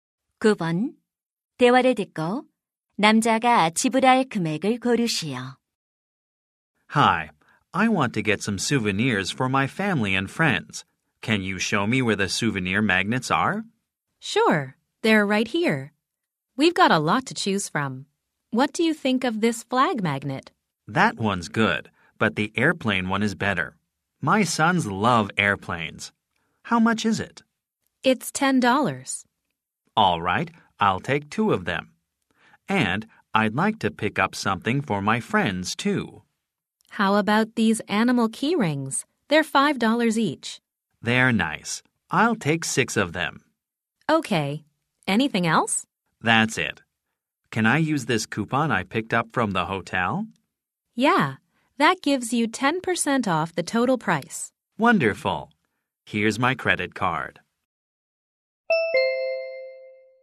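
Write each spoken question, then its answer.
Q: 대화를 듣고 남자가 지불할 금액을 고르시오.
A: $45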